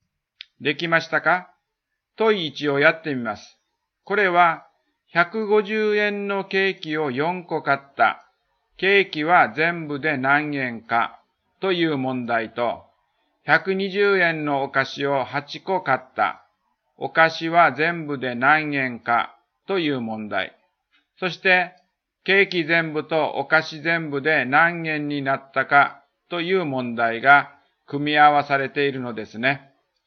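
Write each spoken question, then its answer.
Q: そして、ケーキ全部とお菓子全部で何円になったかという問題が組み合わされているのですね。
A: 1560円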